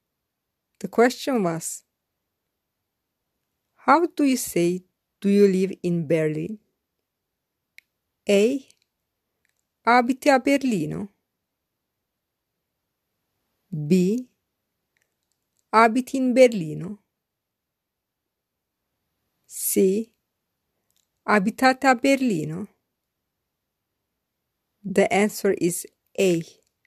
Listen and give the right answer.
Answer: The answer is A.